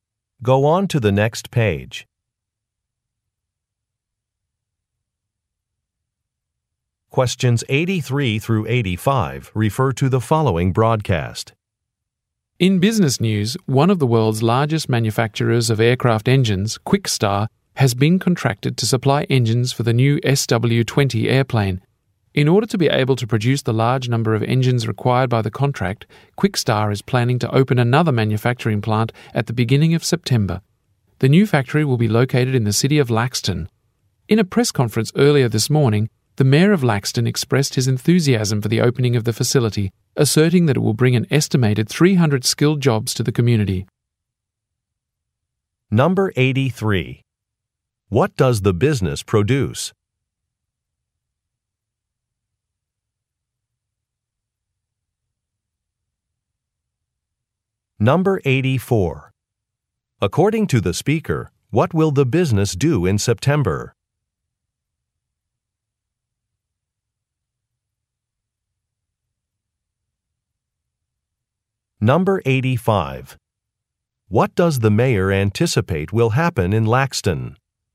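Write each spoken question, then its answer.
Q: What does the business produce?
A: Aircraft engines

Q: According to the speaker, what will the business do in September?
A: Open another manufacturing plant

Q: What does the mayor anticipate will happen in Laxton?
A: About 300 skilled jobs will be created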